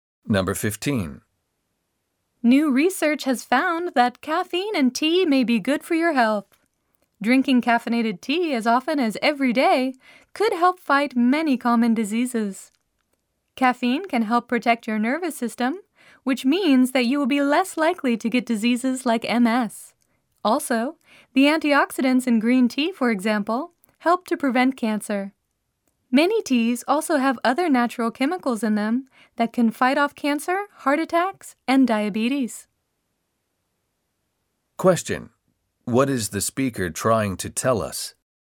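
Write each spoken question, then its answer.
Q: What is the speaker trying to tell us?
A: Drinking caffeinated tea may be good for your health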